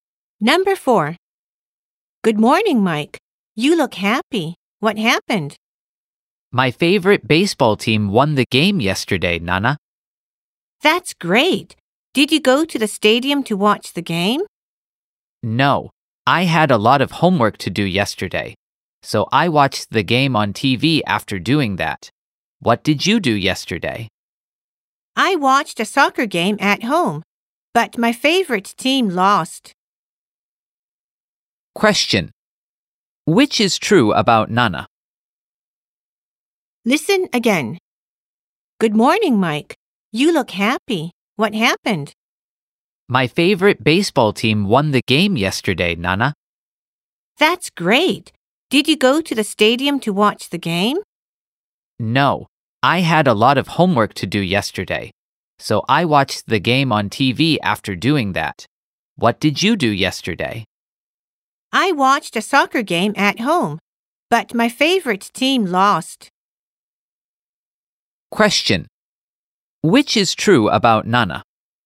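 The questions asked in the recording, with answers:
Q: Which is true about Nana?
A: She watched a soccer game at home, and her favorite team lost.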